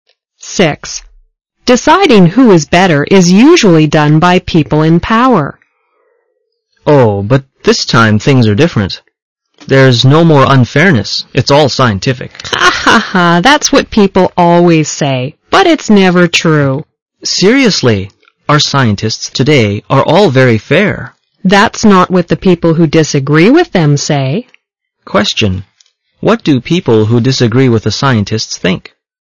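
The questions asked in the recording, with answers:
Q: What do people who disagree with the scientists think?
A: That the scientists are not fair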